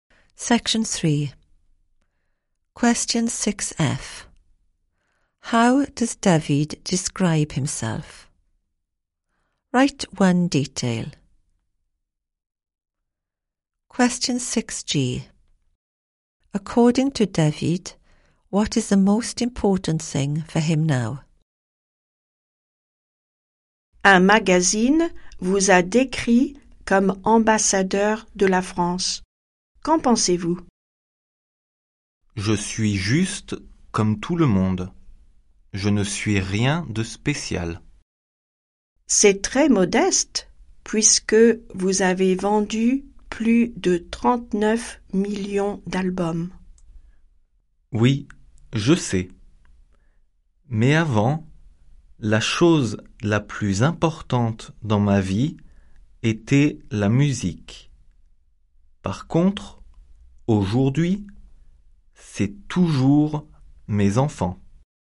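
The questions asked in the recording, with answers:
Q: How does David describe himself?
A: Just like everyone else / nothing special

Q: According to David, what is the most important thing for him now?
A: His children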